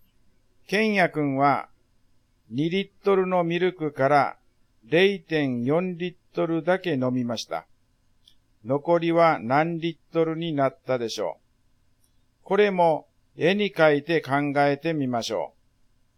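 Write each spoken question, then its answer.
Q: 残りは何リットルになったでしょう。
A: 1.6リットル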